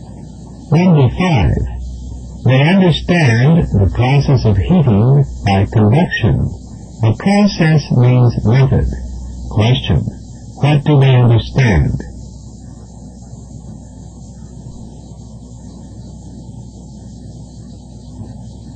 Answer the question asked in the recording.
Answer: the method of heating by convection.